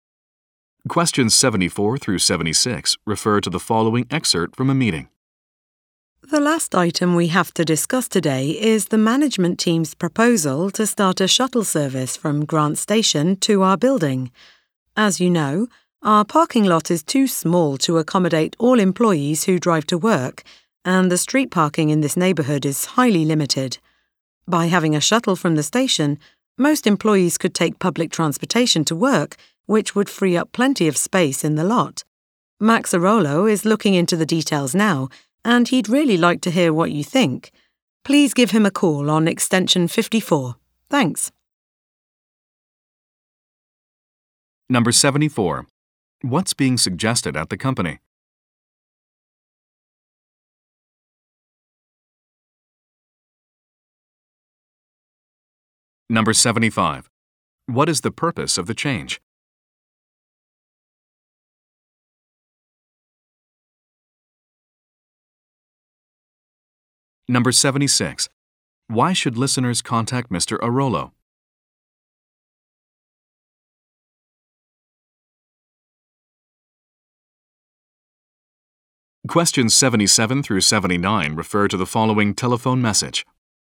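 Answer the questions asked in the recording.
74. A shuttle service from Grant Station
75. To free up parking space
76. To give their opinions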